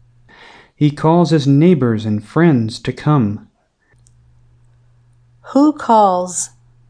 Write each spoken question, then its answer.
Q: Who calls?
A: The man calls.